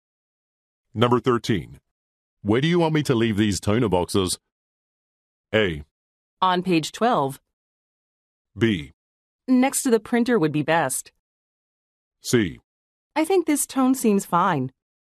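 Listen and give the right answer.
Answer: B: Next to the printer would be best.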